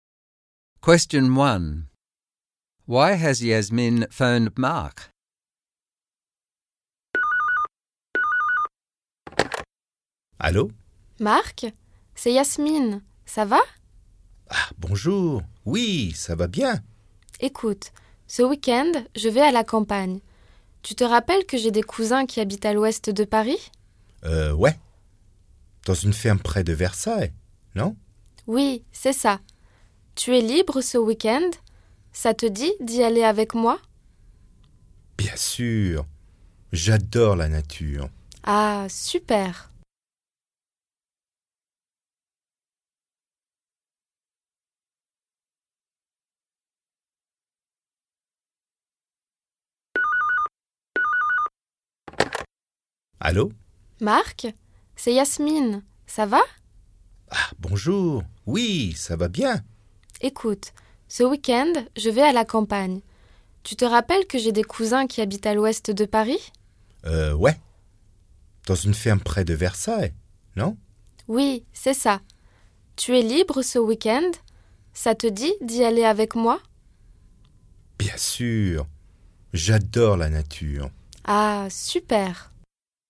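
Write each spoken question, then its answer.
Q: Why has Yasmin phoned Mark?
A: To invite him to come with her this weekend to her cousins' farm in the country near Versailles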